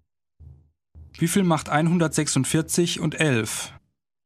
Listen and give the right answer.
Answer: 157. Das macht 157.